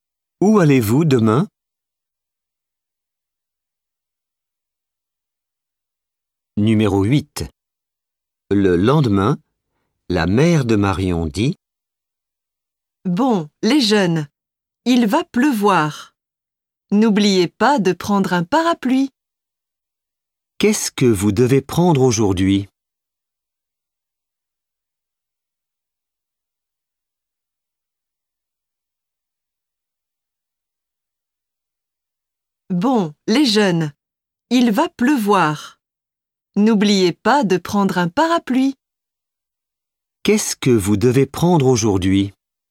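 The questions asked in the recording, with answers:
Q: Qu'est-ce que vous devez prendre aujourd'hui?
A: Un parapluie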